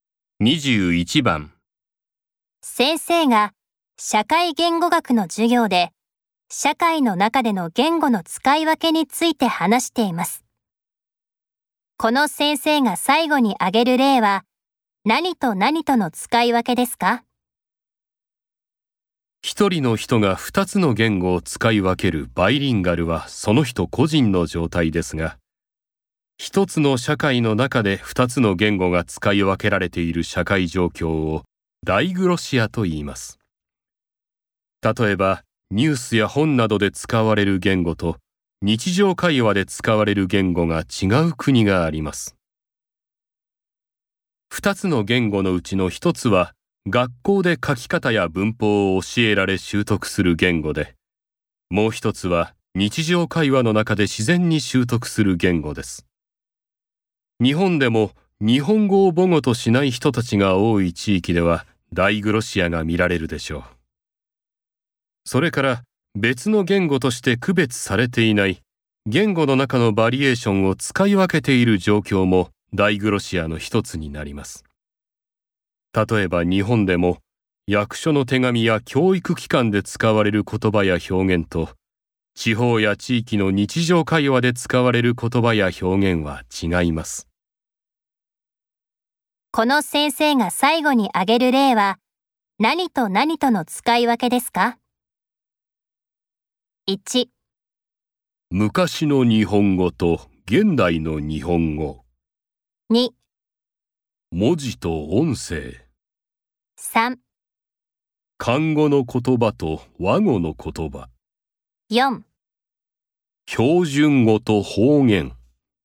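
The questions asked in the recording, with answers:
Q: この先生が最後に挙げる例は何と何との使い分けですか?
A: 4: 標準語と方言。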